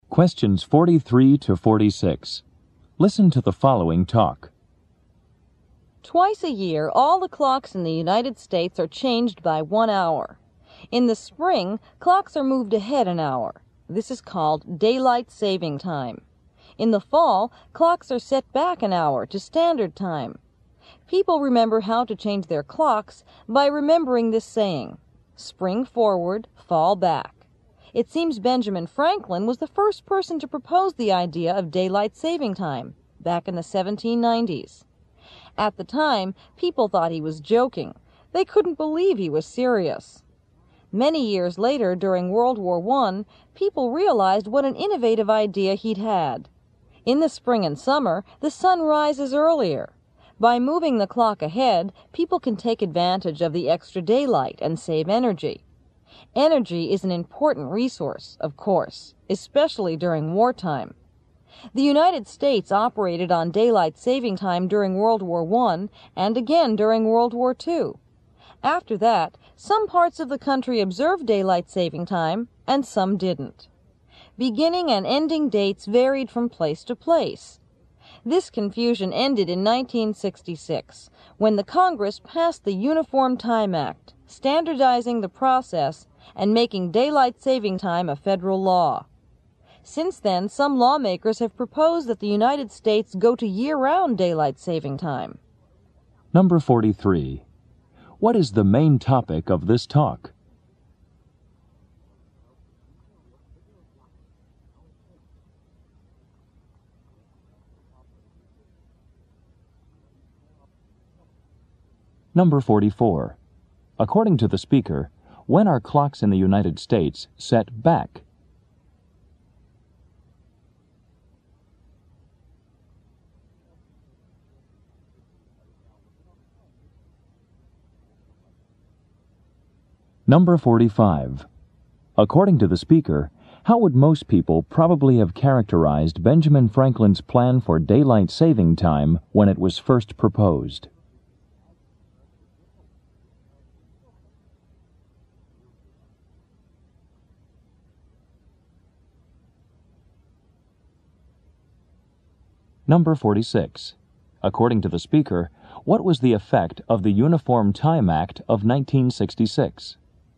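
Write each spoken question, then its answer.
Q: What is the main topic of this talk?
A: Daylight saving time in the United States

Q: According to the speaker, when are clocks in the United States set back?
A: In the fall

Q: According to the speaker, how would most people probably have characterized Benjamin Franklin's plan for daylight saving time when it was first proposed?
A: As a joke; they couldn't believe he was serious

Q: According to the speaker, what was the effect of the Uniform Time Act of 1966?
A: It standardized daylight saving time and made it a federal law, ending the confusion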